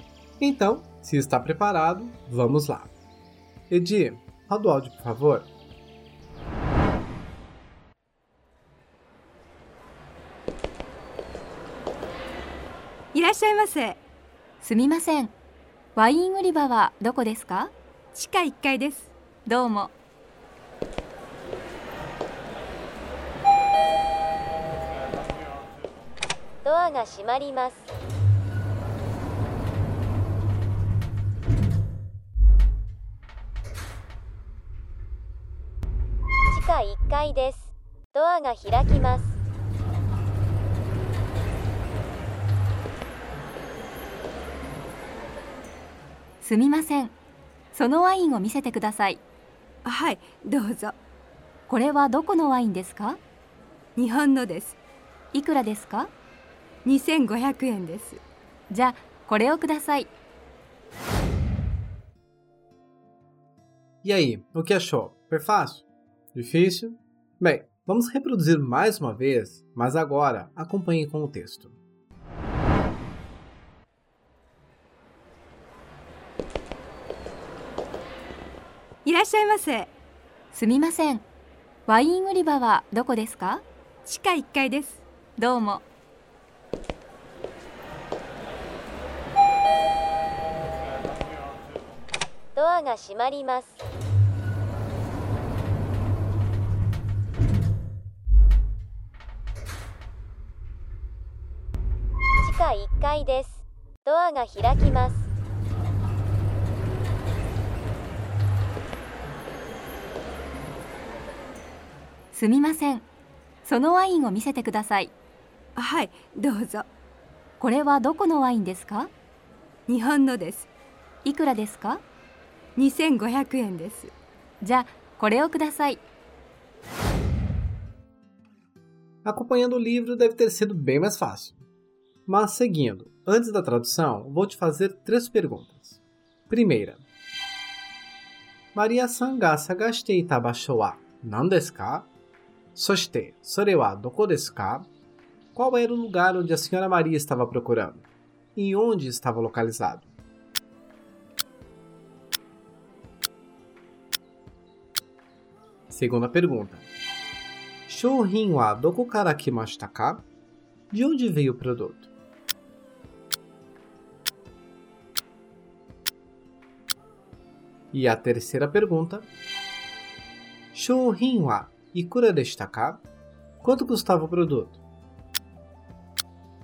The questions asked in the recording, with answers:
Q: Qual era o lugar onde a senhora Maria estava procurando?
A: o lugar que a senhora Maria procurava é a seção de vinhos, e ficava no primeiro andar do subsolo.

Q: De onde veio o produto?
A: o produto, que é o vinho, veio do Japão

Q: quanto custava o produto?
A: o vinho custava 2.500 ienes.